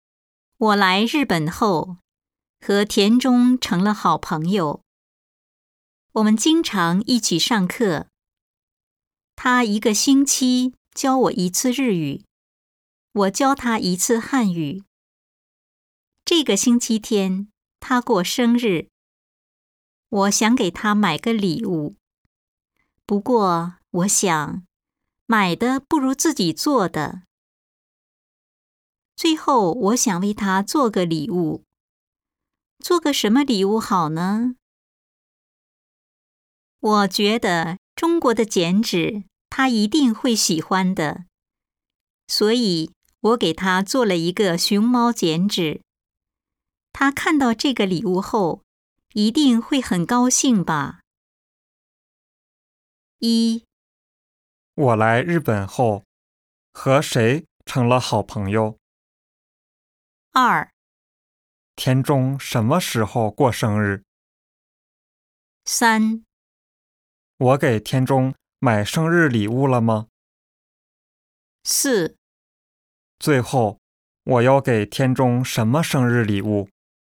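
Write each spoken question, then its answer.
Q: 我来日本后,和谁成了好朋友?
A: 田中

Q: 田中什么时候过生日?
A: 这个星期天

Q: 我给田中买生日礼物了吗?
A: 没有买,是自己做的

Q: 最后,我要给田中什么生日礼物?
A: 熊猫剪纸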